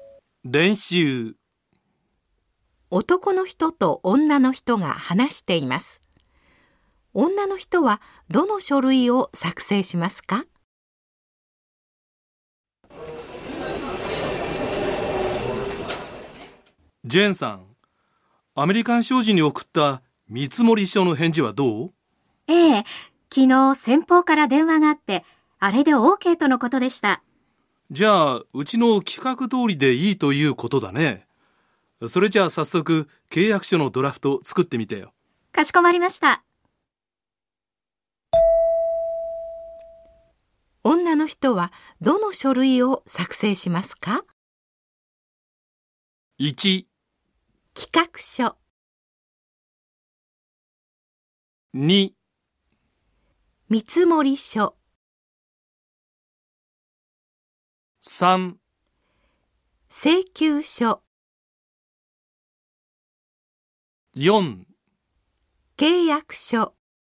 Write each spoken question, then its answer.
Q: 女の人はどの書類を作成しますか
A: 正しい答えは4です。